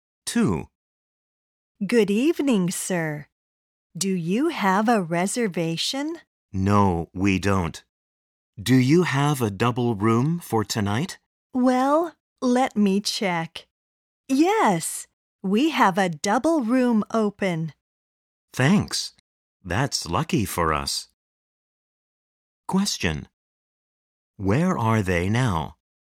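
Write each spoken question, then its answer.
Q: Where are they now?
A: At a hotel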